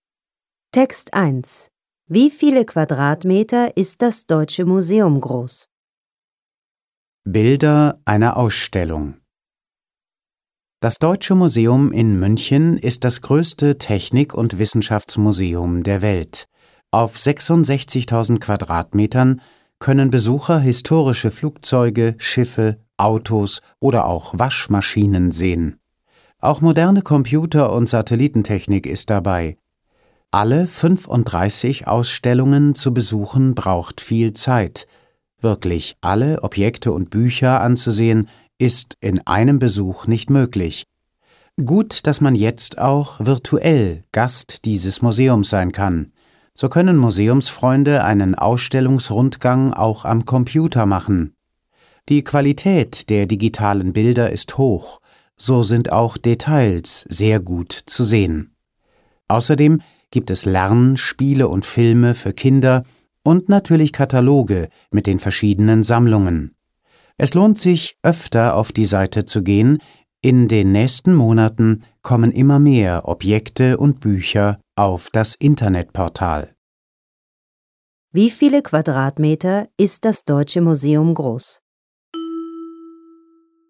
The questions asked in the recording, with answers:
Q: Wie viele Quadratmeter ist das Deutsche Museum groß?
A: Es ist 66.000 Quadratmeter groß.